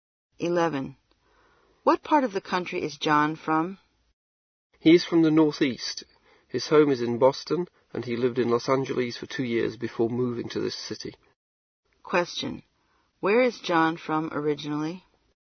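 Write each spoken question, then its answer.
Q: Where is John from originally?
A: Boston, in the Northeast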